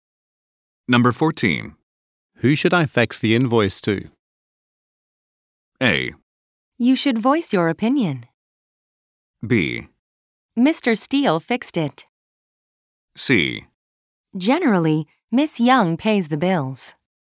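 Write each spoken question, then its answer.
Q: Who should I fax the invoice to?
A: C: Generally, Miss Young pays the bills.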